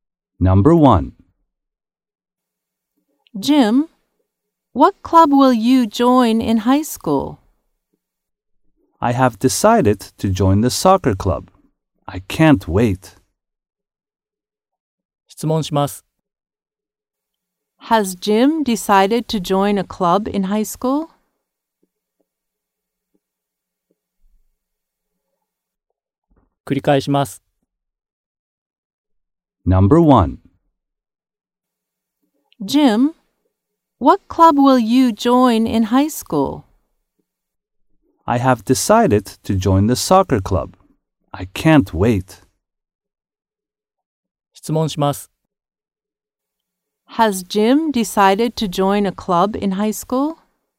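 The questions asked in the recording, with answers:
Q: Has Jim decided to join a club in high school?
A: Yes, he has (the soccer club).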